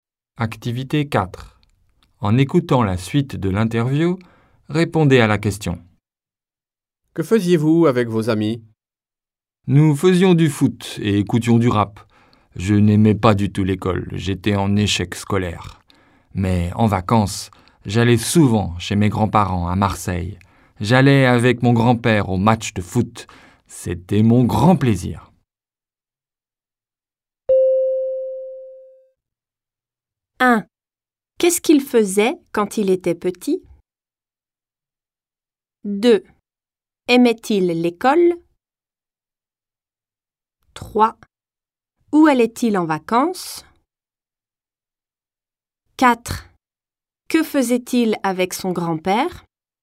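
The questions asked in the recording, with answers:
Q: Qu'est-ce qu'il faisait quand il était petit?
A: Il faisait du foot et écoutait du rap avec ses amis.

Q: Aimait-il l'école?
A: Non, pas du tout ; il était en échec scolaire.

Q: Où allait-il en vacances?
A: Chez ses grands-parents à Marseille.

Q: Que faisait-il avec son grand-père?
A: Il allait au match de foot.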